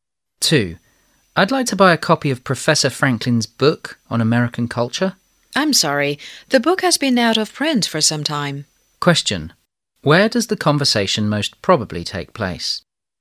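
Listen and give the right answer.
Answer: In a bookstore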